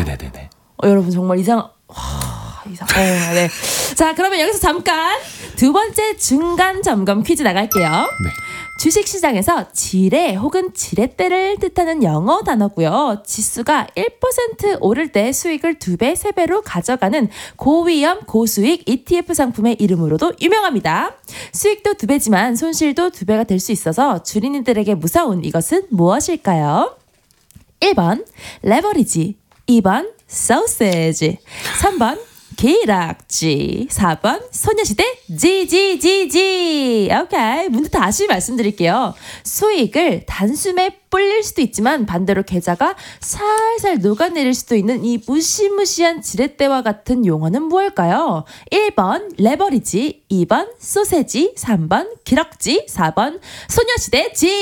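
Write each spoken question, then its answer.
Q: 수익도 두 배지만 손실도 두 배가 될 수 있어서 주린이들에게 무서운 이것은 무엇일까요?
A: 1: 레버리지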